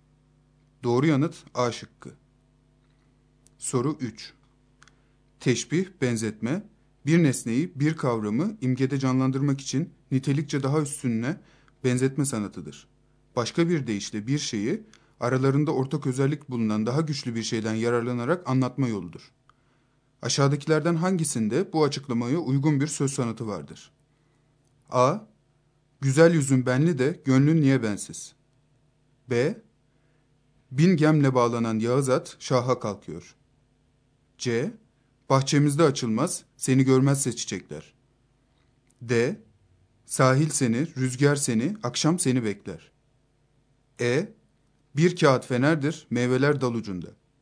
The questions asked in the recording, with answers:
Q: Aşağıdakilerden hangisinde bu açıklamaya uygun bir söz sanatı vardır?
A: Doğru yanıt E şıkkı.